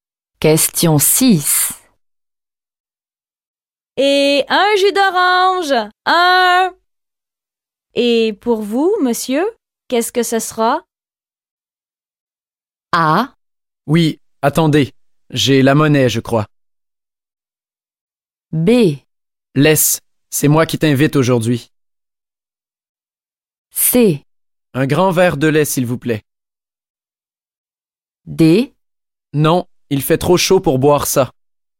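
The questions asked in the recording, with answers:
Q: Et pour vous, monsieur, qu'est-ce que ce sera?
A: C: Un grand verre de lait, s'il vous plaît.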